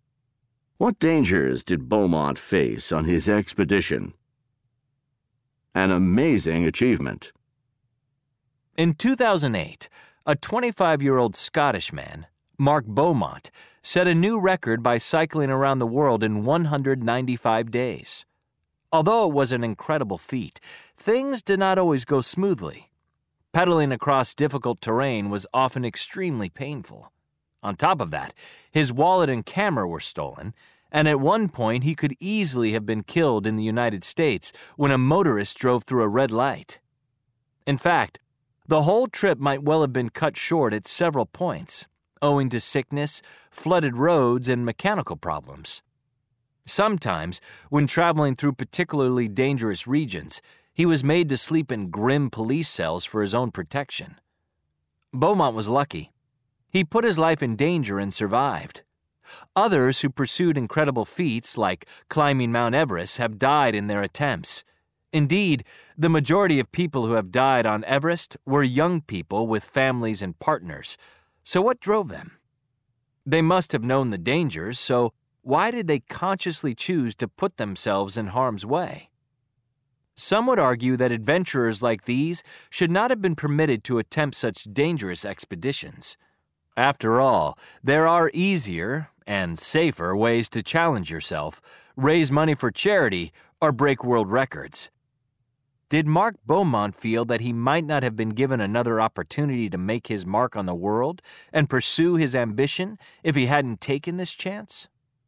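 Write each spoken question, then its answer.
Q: What dangers did Beaumont face on his expedition?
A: Painful terrain, theft of his wallet and camera, nearly being killed by a motorist, sickness, flooded roads, mechanical problems, and dangerous regions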